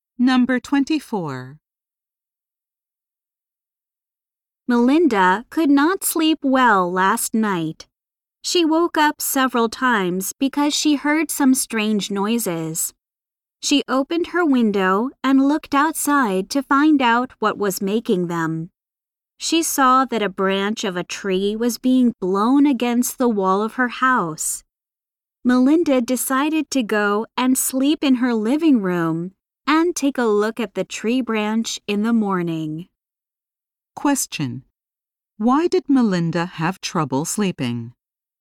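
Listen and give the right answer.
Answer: A tree branch was blowing against her house wall, making strange noises.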